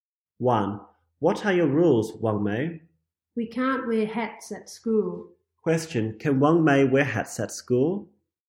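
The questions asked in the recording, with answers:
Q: Can Wang Mei wear hats at school?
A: No, she can't.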